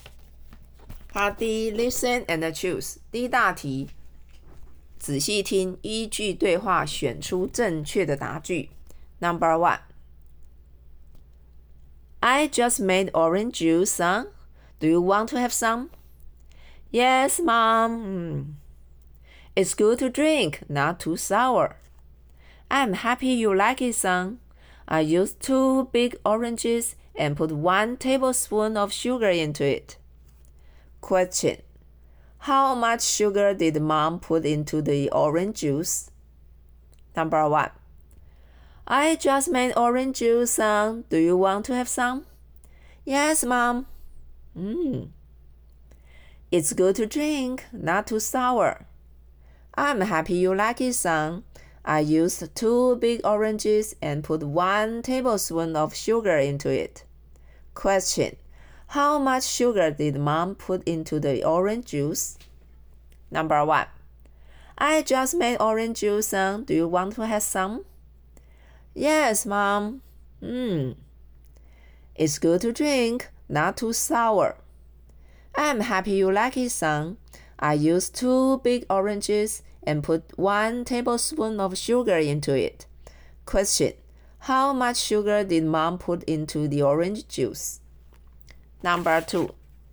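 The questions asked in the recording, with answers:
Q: How much sugar did Mom put into the orange juice?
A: One tablespoon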